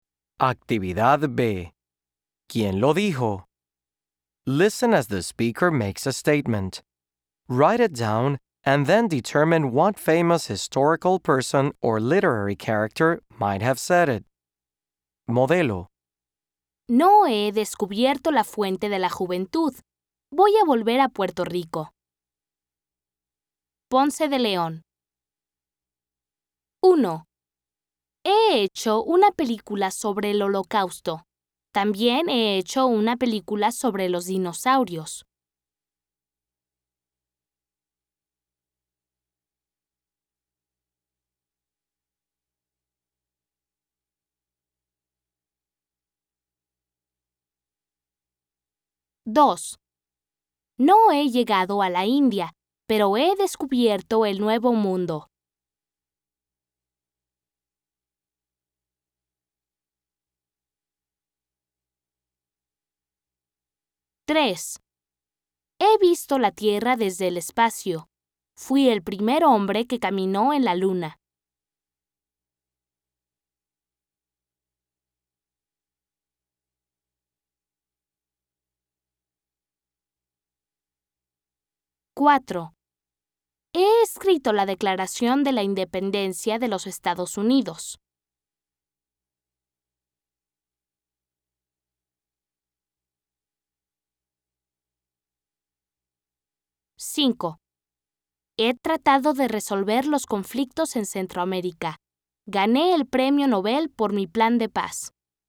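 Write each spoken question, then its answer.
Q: He hecho una película sobre el Holocausto. También he hecho una película sobre los dinosaurios.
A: Steven Spielberg

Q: No he llegado a la India, pero he descubierto el Nuevo Mundo.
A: Cristóbal Colón

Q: He visto la Tierra desde el espacio.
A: Neil Armstrong

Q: He escrito la Declaración de la Independencia de los Estados Unidos.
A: Thomas Jefferson

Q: He tratado de resolver los conflictos en Centroamérica. Gané el Premio Nobel por mi plan de paz.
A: Óscar Arias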